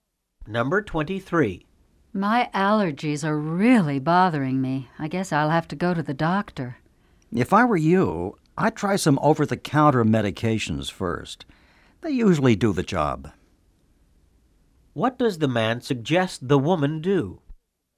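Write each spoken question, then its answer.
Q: What does the man suggest the woman do?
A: Try some over-the-counter medications first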